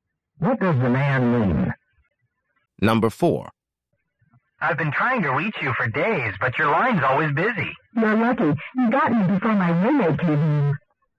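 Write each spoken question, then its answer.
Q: What can be inferred about the woman's roommate?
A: The roommate uses the phone a lot.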